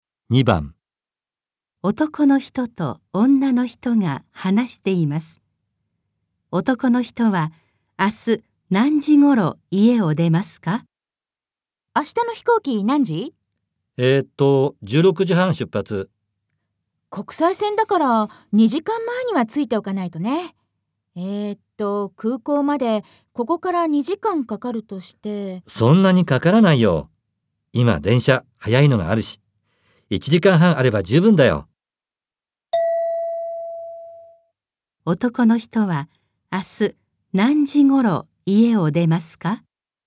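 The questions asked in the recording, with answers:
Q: 男の人は明日何時ごろ家を出ますか?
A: 1時ごろ(13時ごろ)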